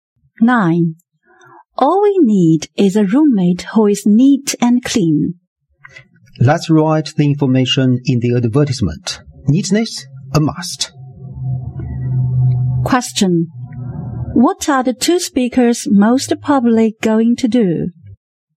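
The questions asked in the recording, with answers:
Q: What are the two speakers most probably going to do?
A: Write an advertisement for a roommate.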